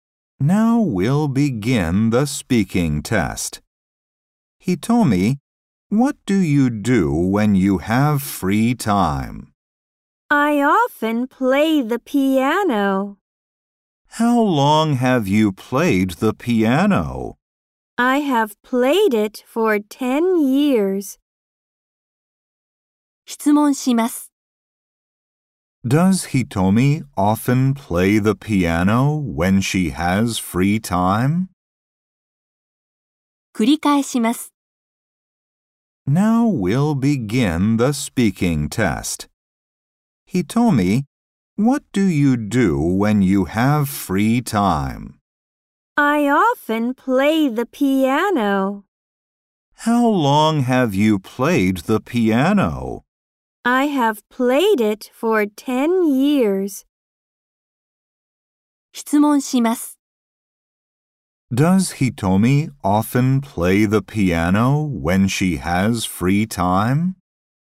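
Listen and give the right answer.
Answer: Yes, she does.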